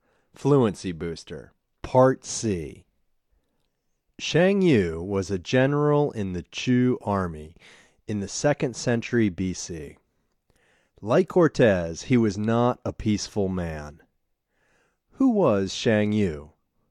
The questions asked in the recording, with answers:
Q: Who was Shang Yu?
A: Shang Yu was a general in the Chu army.